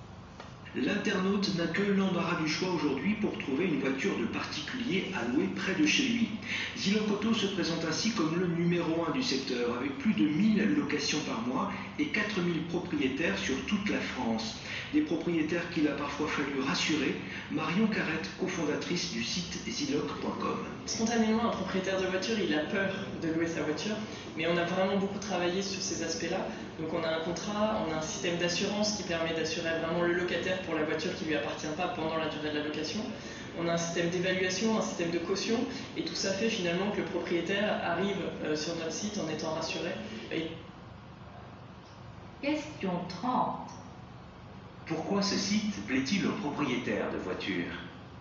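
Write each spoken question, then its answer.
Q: Pourquoi ce site plaît-il aux propriétaires de voitures ?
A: Parce qu'il les rassure : contrat, assurance du locataire, système d'évaluation et caution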